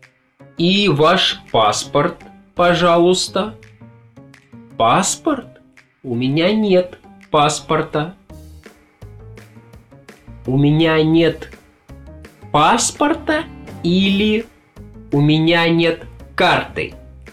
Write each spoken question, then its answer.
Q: У меня нет паспорта или у меня нет карты?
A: Паспорта.